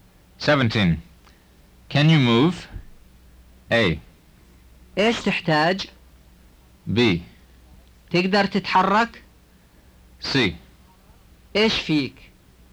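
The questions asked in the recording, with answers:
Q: Can you move?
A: B: تقدر تتحرك؟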